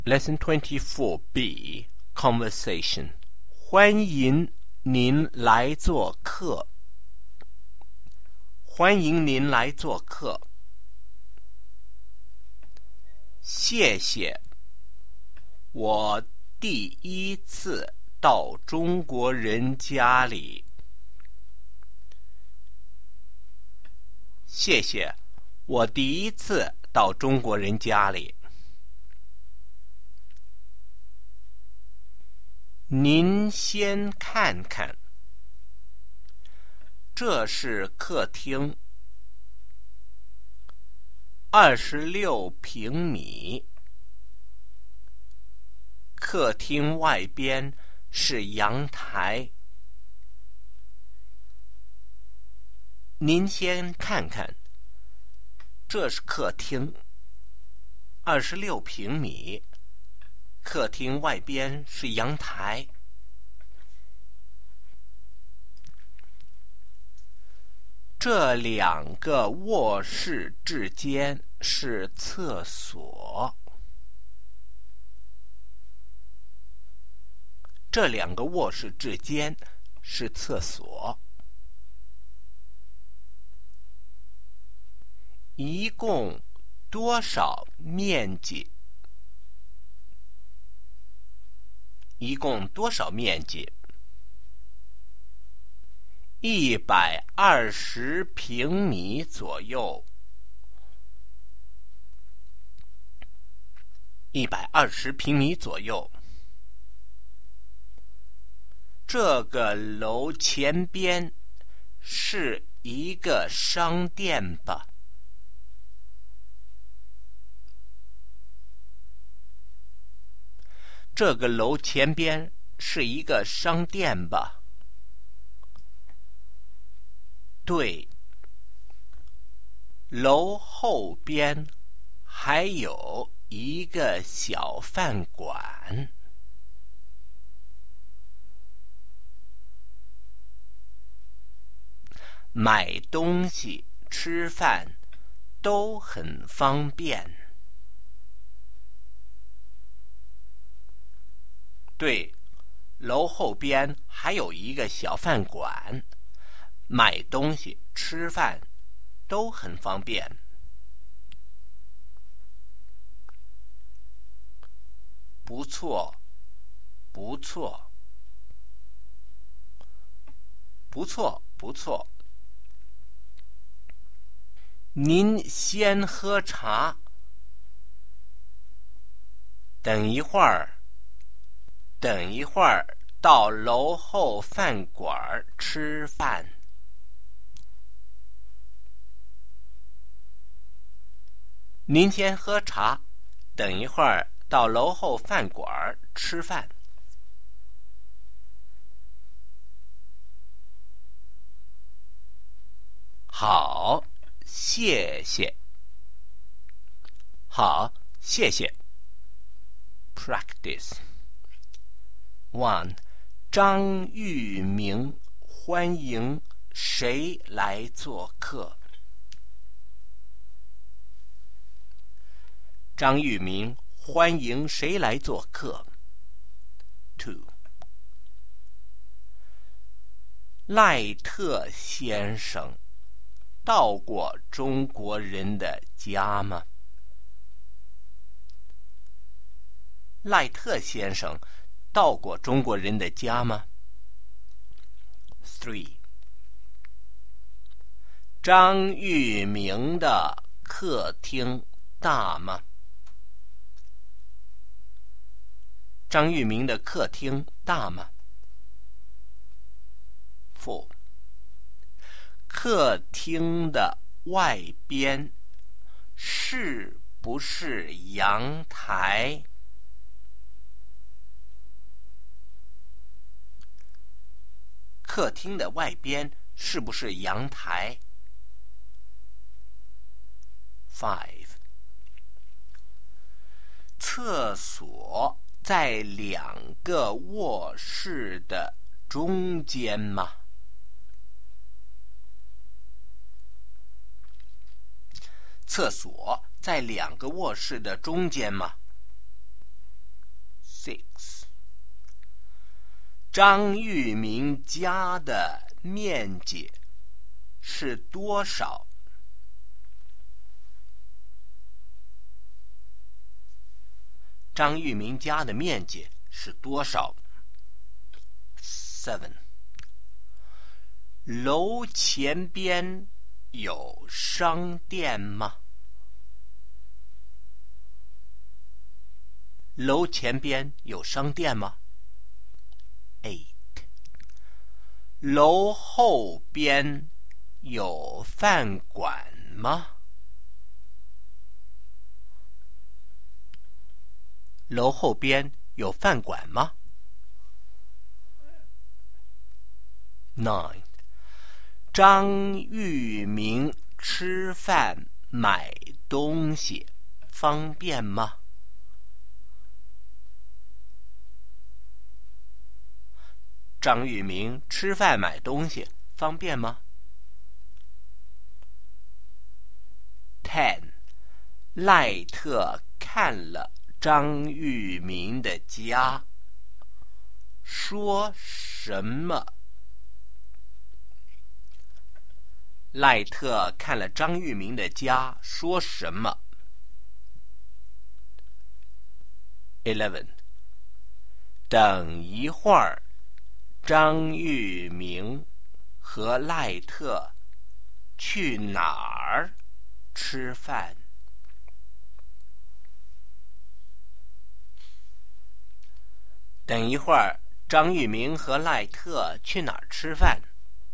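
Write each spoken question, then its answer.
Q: 赖特先生到过中国人的家吗?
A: 没有,他第一次到中国人家里

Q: 客厅的外边是不是阳台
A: 是,客厅外边是阳台

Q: 张玉明家的面积是多少?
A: 120平米左右

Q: 楼后边有饭馆吗?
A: 有,一个小饭馆

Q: 张玉明吃饭买东西方便吗?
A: 很方便

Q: 等一会儿,张玉明和赖特去哪儿吃饭?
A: 楼后边的小饭馆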